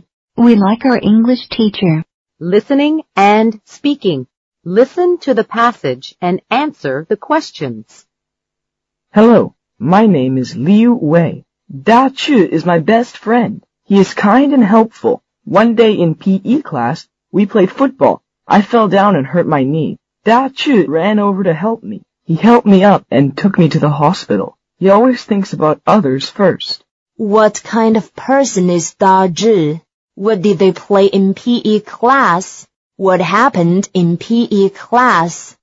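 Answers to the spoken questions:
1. He is kind and helpful.
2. Football.
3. Liu Wei fell down and hurt his knee, and Da Chu helped him and took him to the hospital.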